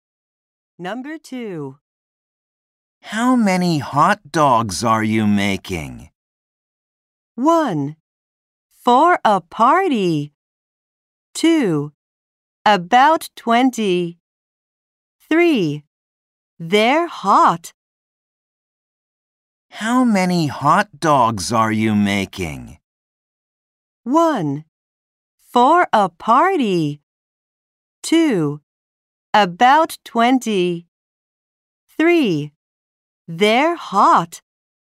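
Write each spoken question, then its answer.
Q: How many hot dogs are you making?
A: 2: About 20.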